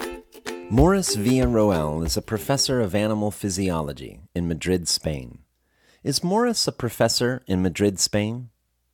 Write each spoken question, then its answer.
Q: Is Morris a professor in Madrid, Spain?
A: Yes, Morris is a professor in Madrid, Spain.